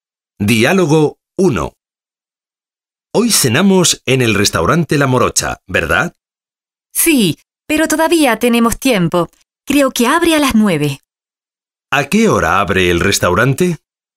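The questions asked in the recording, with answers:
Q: ¿A qué hora abre el restaurante?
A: A las 9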